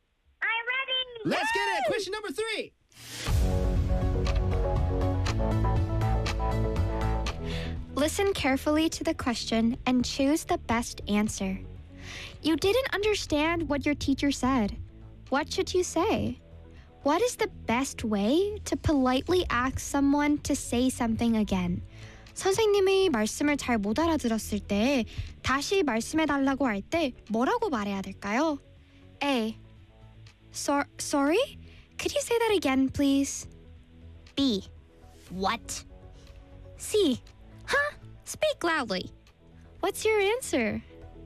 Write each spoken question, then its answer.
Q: What is the best way to politely ask someone to say something again?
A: 맞췄어요.